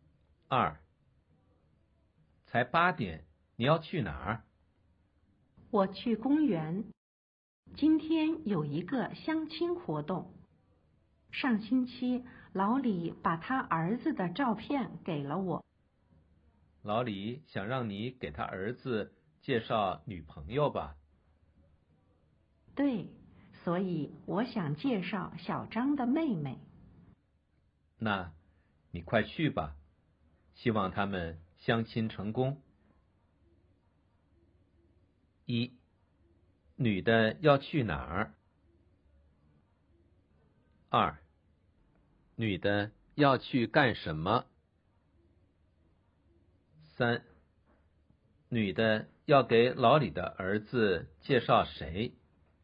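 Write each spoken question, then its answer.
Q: 女的要去哪儿?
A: 公园

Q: 女的要去干什么?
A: 参加相亲活动

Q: 女的要给老李的儿子介绍谁?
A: 小张的妹妹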